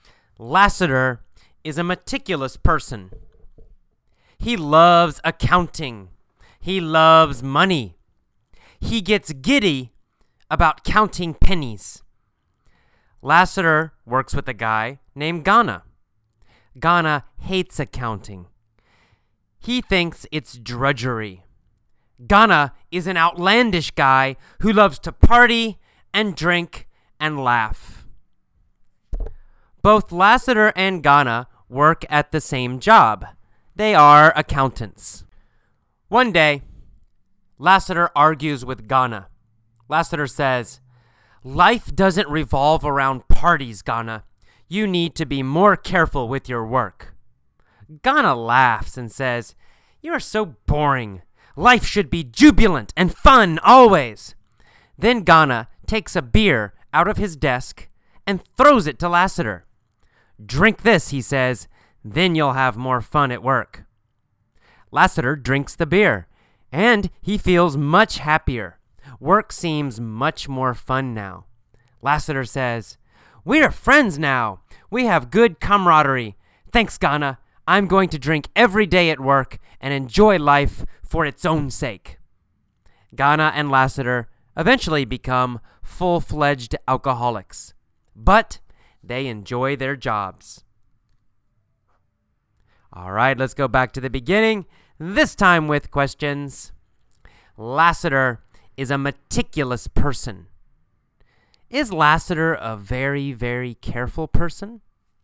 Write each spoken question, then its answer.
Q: Is Lassiter a very, very careful person?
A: Yes, that's right. Lassiter is a meticulous person.